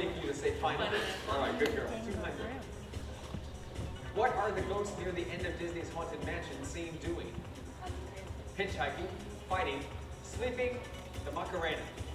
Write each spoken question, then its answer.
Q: What are the ghosts near the end of Disney's Haunted Mansion seen doing?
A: Hey, hitchhiking, final is right for 200 points.